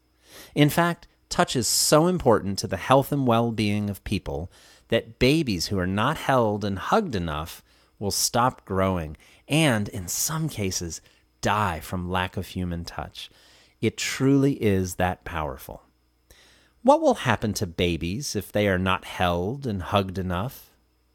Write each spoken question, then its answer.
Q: What will happen to babies if they are not held and hugged enough?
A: Babies who are not held and hugged enough will stop growing.